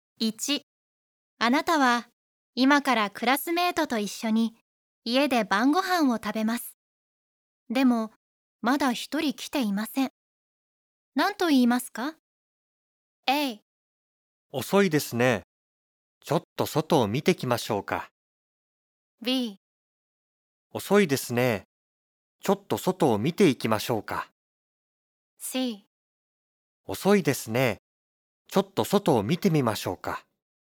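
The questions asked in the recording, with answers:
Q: でもまだ一人来ていません。何と言いますか?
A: A: 遅いですね。ちょっと外を見てきましょうか。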